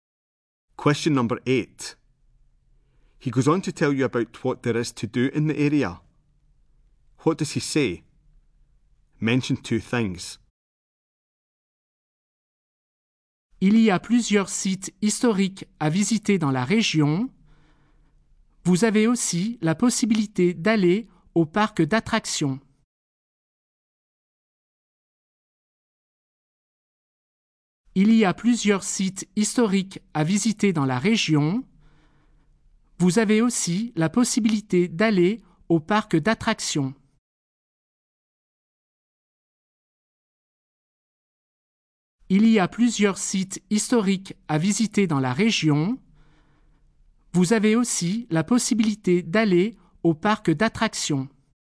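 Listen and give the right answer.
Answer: Several historic sites to visit; you can go to the theme park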